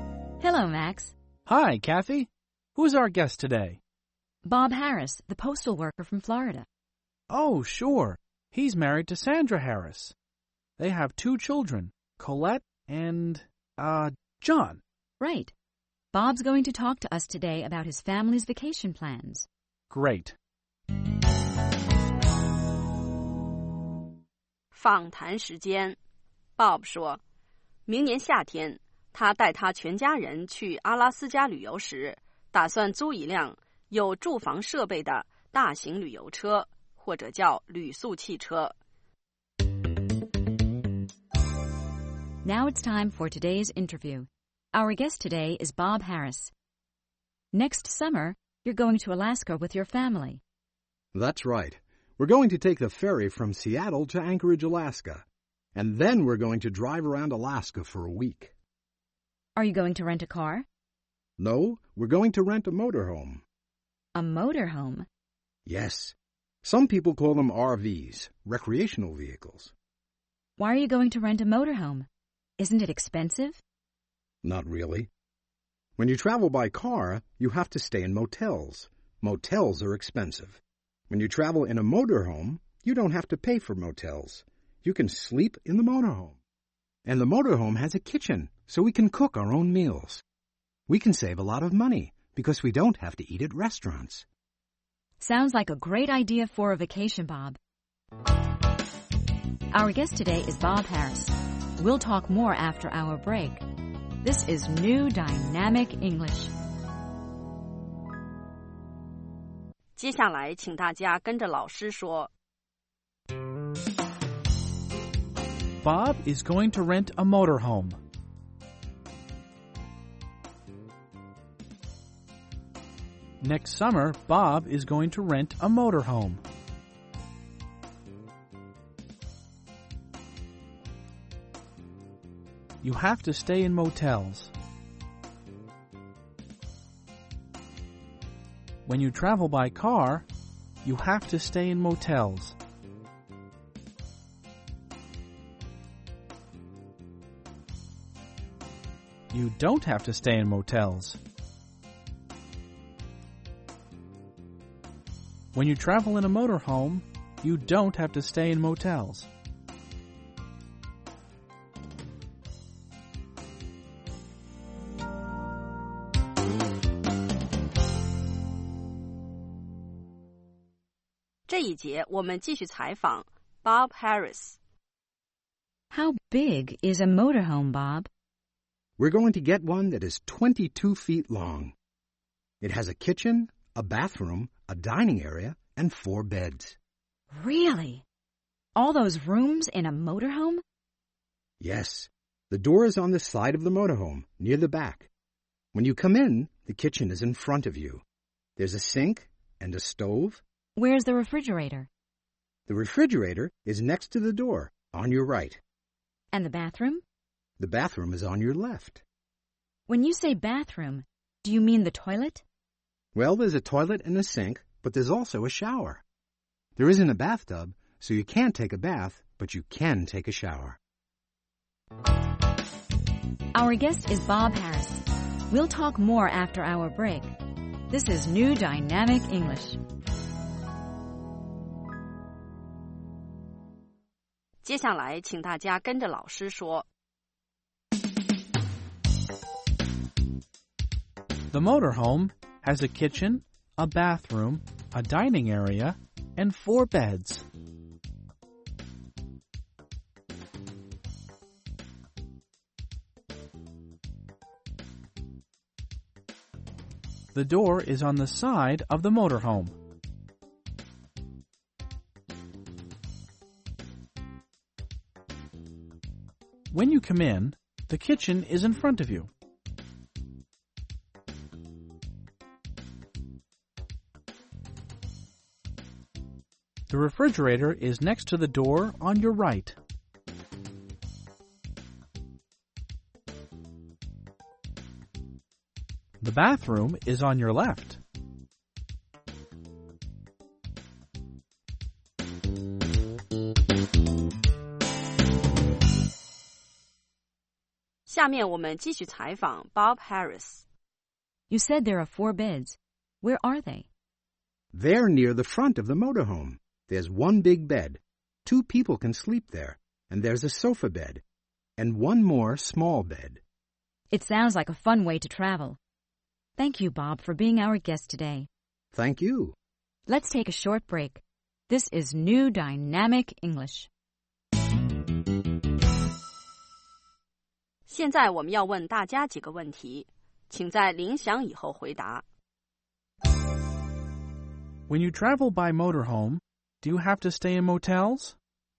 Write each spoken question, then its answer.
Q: When you travel by motorhome, do you have to stay in motels?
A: No, you don't. You don't have to stay in motels because you can sleep in your motorhome.